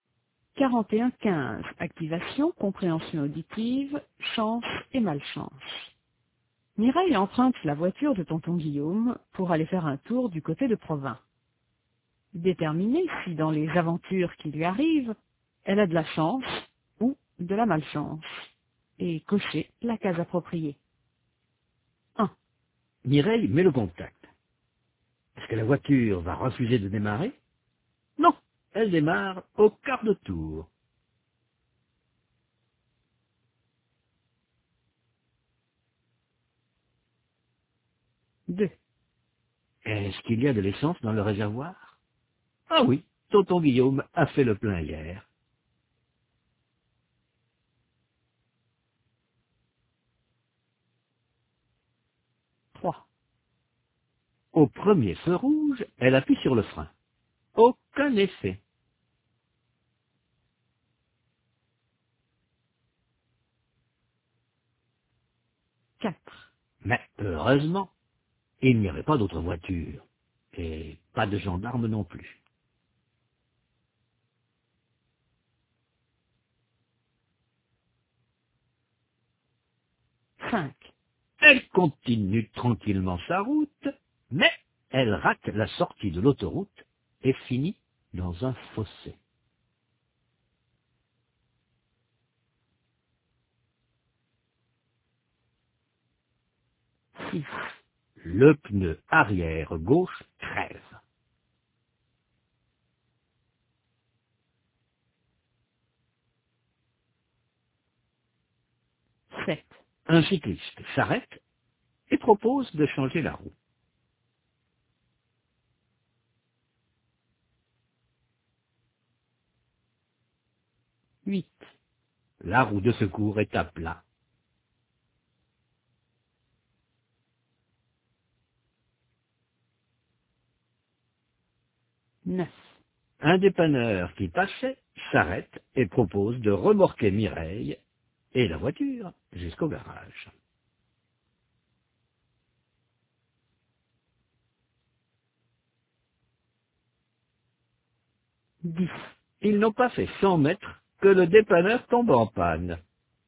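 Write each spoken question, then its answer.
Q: Mireille met le contact. Est-ce que la voiture va refuser de démarrer? Non, elle démarre au quart de tour.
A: chance

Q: Est-ce qu'il y a de l'essence dans le réservoir? Ah oui, tonton Guillaume a fait le plein hier.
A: chance

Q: Au premier feu rouge, elle appuie sur le frein. Aucun effet.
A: malchance

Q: Mais heureusement, il n'y avait pas d'autre voiture, et pas de gendarme non plus.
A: chance

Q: Elle continue tranquillement sa route, mais elle rate la sortie de l'autoroute et finit dans un fossé.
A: malchance

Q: Le pneu arrière gauche crève.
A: malchance

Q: Un cycliste s'arrête et propose de changer la roue.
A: chance

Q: La roue de secours est à plat.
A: malchance

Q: Un dépanneur qui passait s'arrête et propose de remorquer Mireille et la voiture jusqu'au garage.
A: chance

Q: Ils n'ont pas fait 100 mètres que le dépanneur tombe en panne.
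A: malchance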